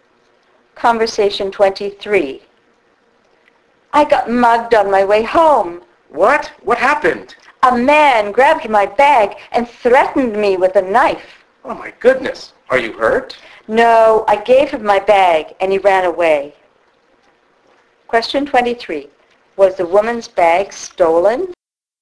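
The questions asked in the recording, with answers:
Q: Was the woman's bag stolen?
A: Yes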